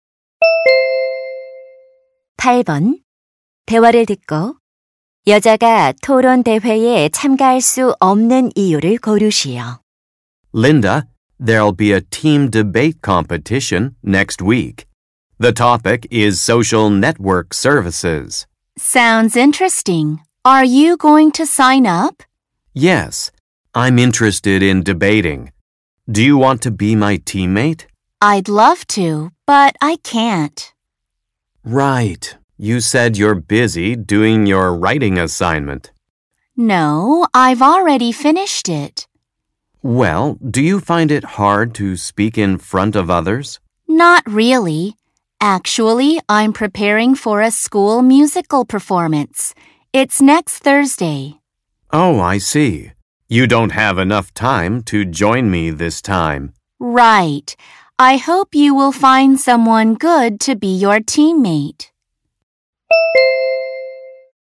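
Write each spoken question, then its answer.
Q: 대화를 듣고 여자가 토론 대회에 참가할 수 없는 이유를 고르시오.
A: 학교 뮤지컬 공연을 준비해야 해서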